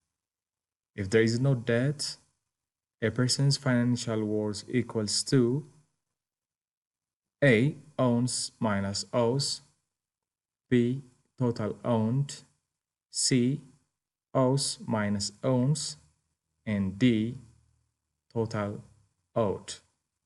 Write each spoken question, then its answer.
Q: If there is no debt, a person's financial worth equals to A, owns minus owes, B, total owned, C, owes minus owns, and D, total owed.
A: The answer is going to be B, total owned.